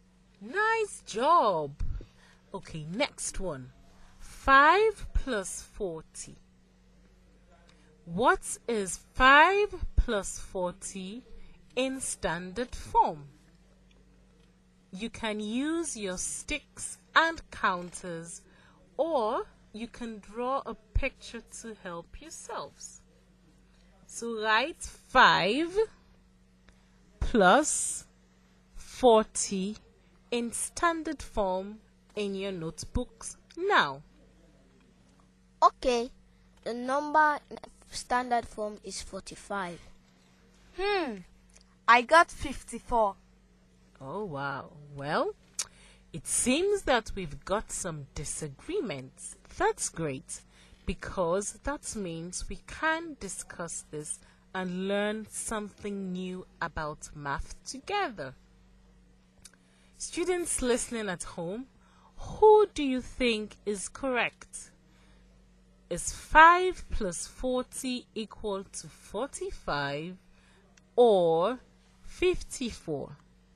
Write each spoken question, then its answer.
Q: Is 5 plus 40 equal to 45 or 54?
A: The answer should be 45.